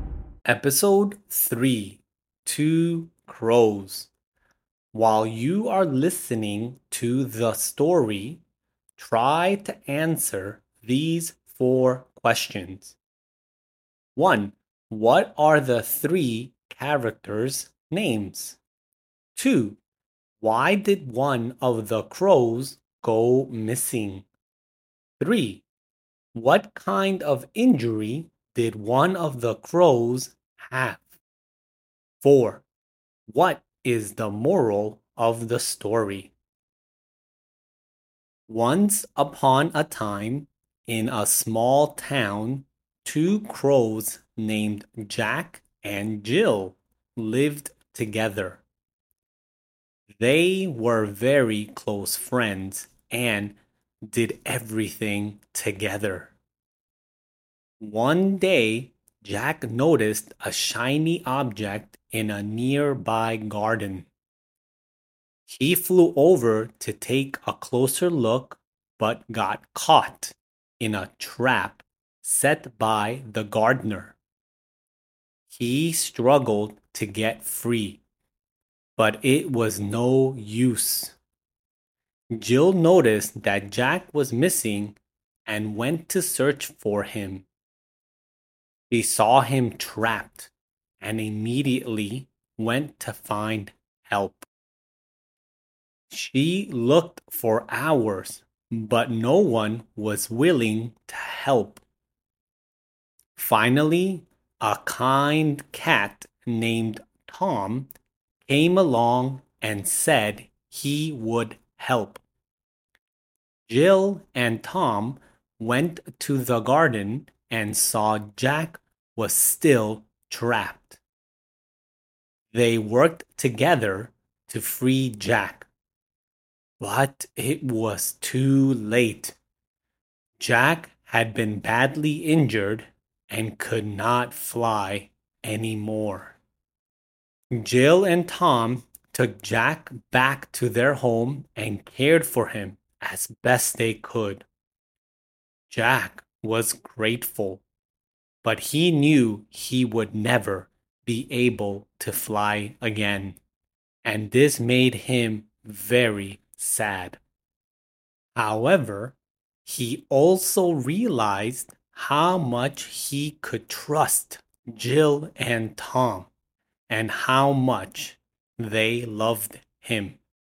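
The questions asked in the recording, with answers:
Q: What are the three characters' names?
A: Jack, Jill and Tom

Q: Why did one of the crows go missing?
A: He got caught in a gardener's trap while looking at a shiny object

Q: What kind of injury did one of the crows have?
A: He was badly injured and could never fly again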